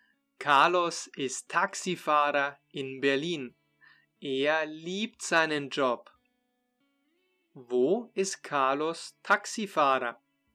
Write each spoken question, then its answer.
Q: Wo ist Carlos Taxifahrer?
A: In Berlin. Er fährt Taxi in Berlin.